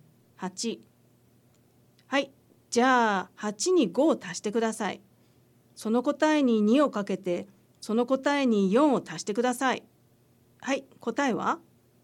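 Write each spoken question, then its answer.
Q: はい、答えは?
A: 30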